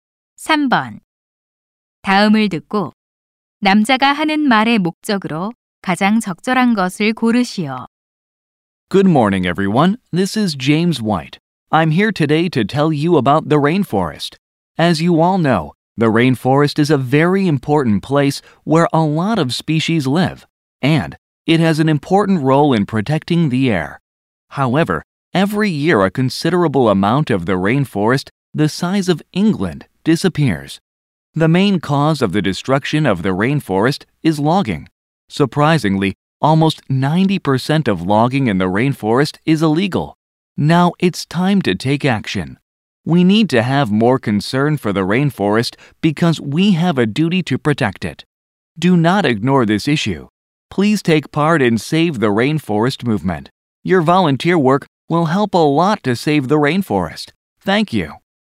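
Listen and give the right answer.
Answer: 열대우림 보호 운동 참여 독려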